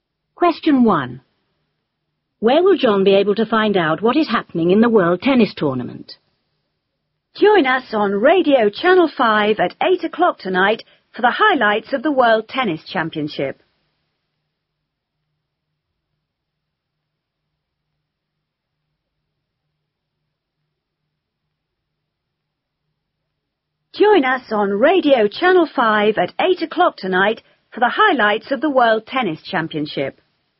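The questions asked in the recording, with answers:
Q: Where will John be able to find out what is happening in the World Tennis Tournament?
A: On Radio Channel 5 (at 8 o'clock tonight)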